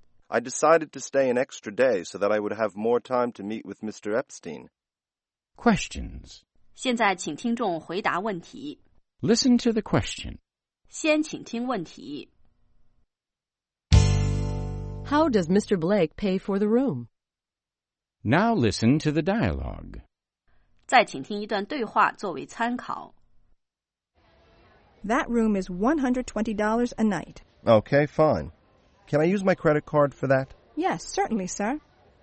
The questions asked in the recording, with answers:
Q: How does Mr. Blake pay for the room?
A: He uses his credit card.